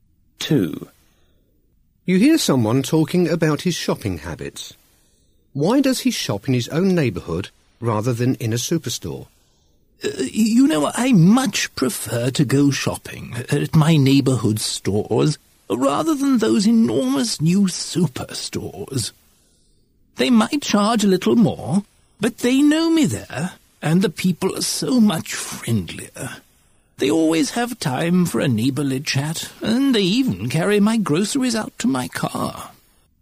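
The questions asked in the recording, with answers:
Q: Why does he shop in his own neighbourhood rather than in a superstore?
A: They know him there and the people are friendlier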